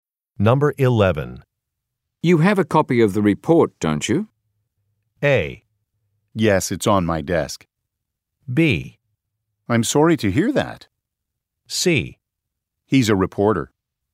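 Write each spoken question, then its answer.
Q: You have a copy of the report, don't you?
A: A: Yes, it's on my desk.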